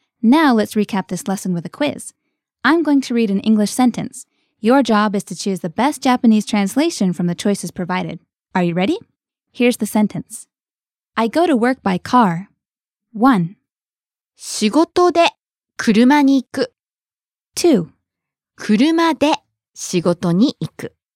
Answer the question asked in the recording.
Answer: 2. 車で仕事に行く。